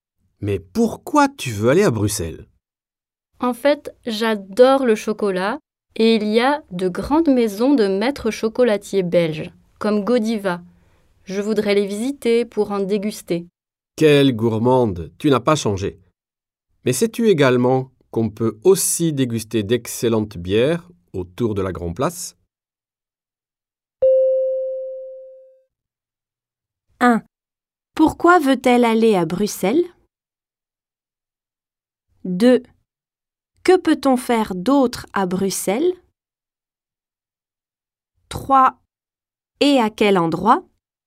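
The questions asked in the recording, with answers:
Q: Pourquoi veut-elle aller à Bruxelles?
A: Parce qu'elle adore le chocolat et veut visiter les maisons de maîtres chocolatiers belges pour en déguster.

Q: Que peut-on faire d'autre à Bruxelles?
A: Déguster d'excellentes bières.

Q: Et à quel endroit?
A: Autour de la Grand Place.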